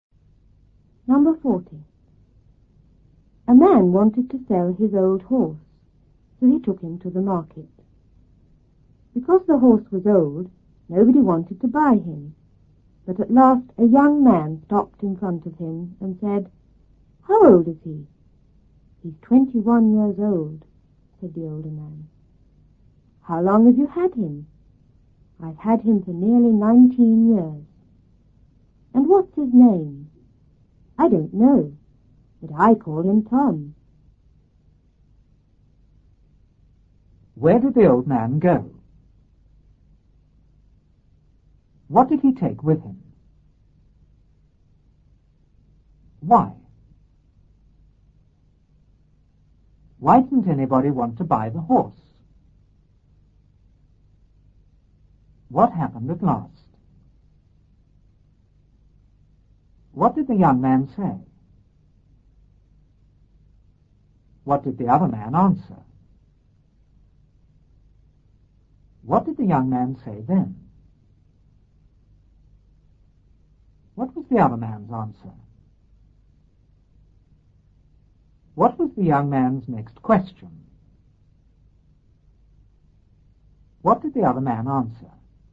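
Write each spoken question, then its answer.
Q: Where did the old man go?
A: To the market

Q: What did he take with him?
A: His old horse

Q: Why didn't anybody want to buy the horse?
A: Because the horse was old

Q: What happened at last?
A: A young man stopped in front of him

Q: What did the young man say?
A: How old is he?

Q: What did the other man answer?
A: He's 21 years old

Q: What did the young man say then?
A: How long have you had him?

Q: What was the other man's answer?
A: I've had him for nearly 19 years

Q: What was the young man's next question?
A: What's his name?

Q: What did the other man answer?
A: I don't know, but I call him Tom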